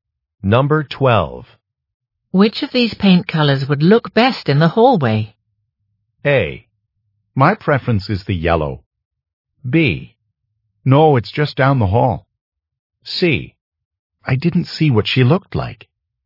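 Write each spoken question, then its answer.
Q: Which of these paint colors would look best in the hallway?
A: A: My preference is the yellow.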